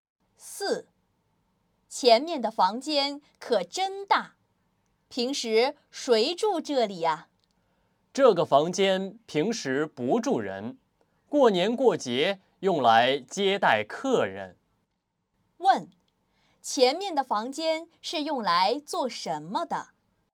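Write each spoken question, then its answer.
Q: 前面的房间是用来做什么的?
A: 过年过节接待客人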